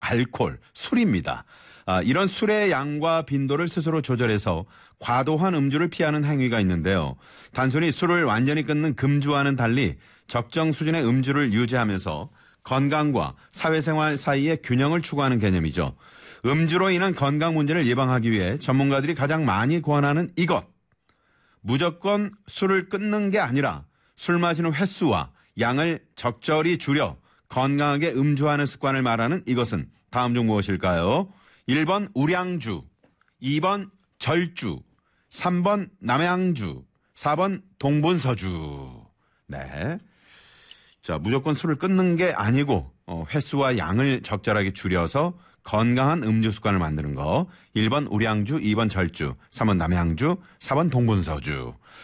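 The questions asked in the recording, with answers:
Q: 무조건 술을 끊는 게 아니라 술 마시는 횟수와 양을 적절히 줄여 건강하게 음주하는 습관을 말하는 이것은 다음 중 무엇일까요?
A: 2번: 절주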